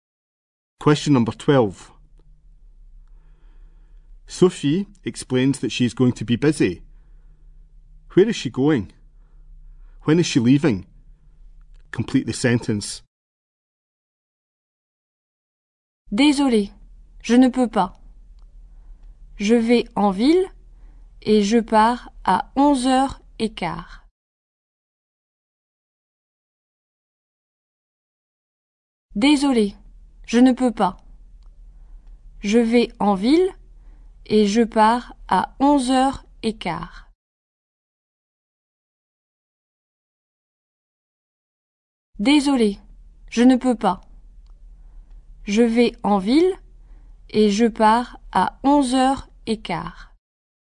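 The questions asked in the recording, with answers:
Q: Where is she going? When is she leaving?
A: Into town, at 11:15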